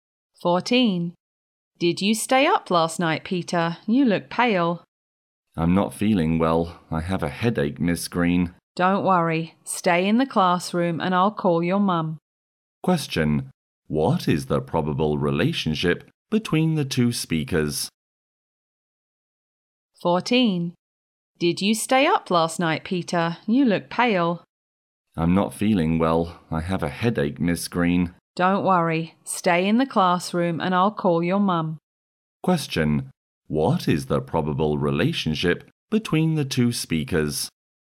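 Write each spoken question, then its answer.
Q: What is the probable relationship between the two speakers?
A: Teacher and student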